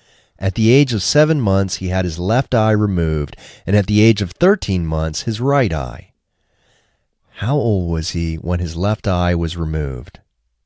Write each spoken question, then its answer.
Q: How old was he when his left eye was removed?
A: He was 7 months old when his left eye was removed.